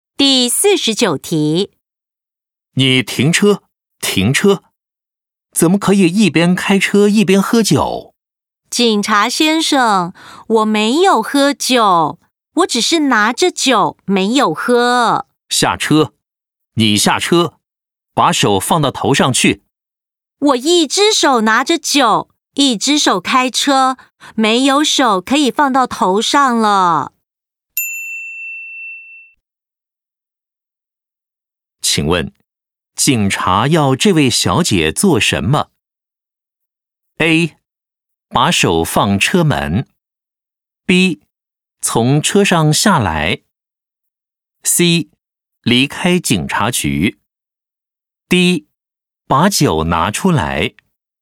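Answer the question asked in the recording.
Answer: B: 从车上下来。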